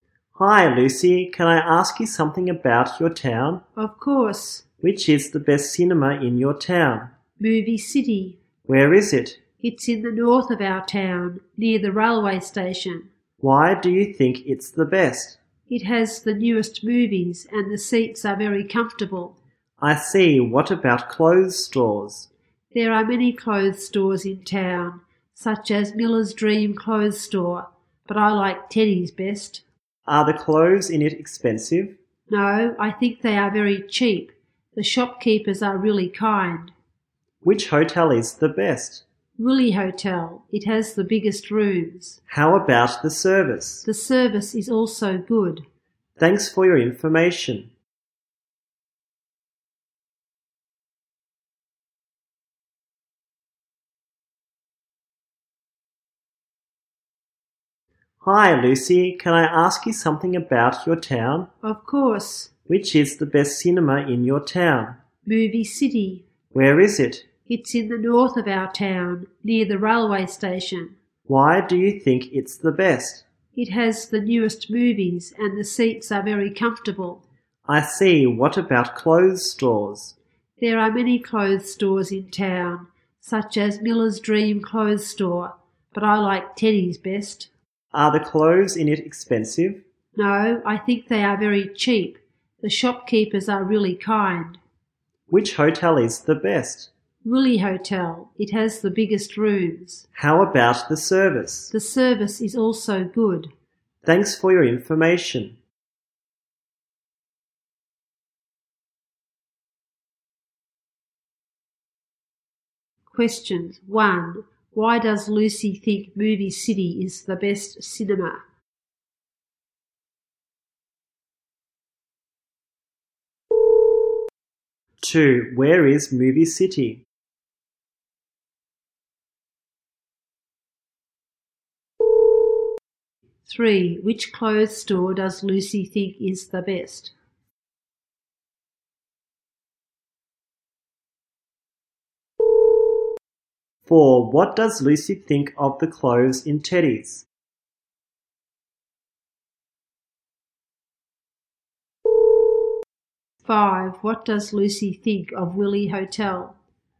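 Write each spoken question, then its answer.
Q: 1. Why does Lucy think Movie City is the best cinema?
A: It has the newest movies and comfortable seats

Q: Two. Where is Movie City?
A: In the north of the town, near the railway station

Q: Three. Which clothes store does Lucy think is the best?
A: Teddy's

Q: Four. What does Lucy think of the clothes in Teddy's?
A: Very cheap

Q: Five. What does Lucy think of Willy Hotel?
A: It has the biggest rooms and good service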